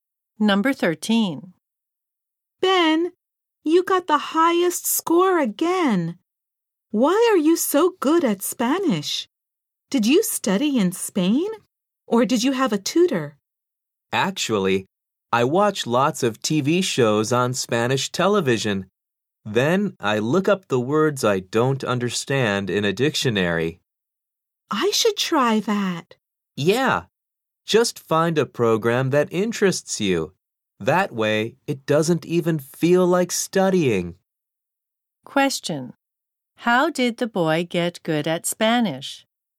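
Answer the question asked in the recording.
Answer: By watching Spanish TV shows and looking up words in a dictionary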